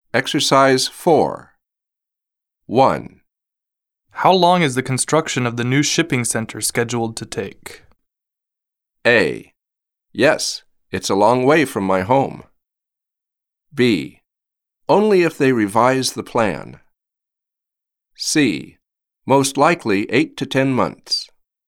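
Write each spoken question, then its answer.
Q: How long is the construction of the new shipping center scheduled to take?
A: C: Most likely 8 to 10 months.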